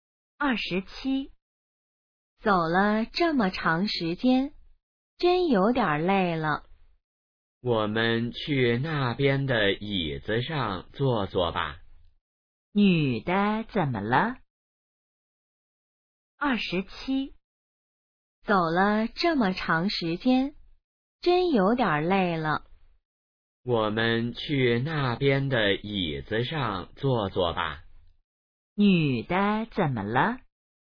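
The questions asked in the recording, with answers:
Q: 女的怎么了?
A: 有点累了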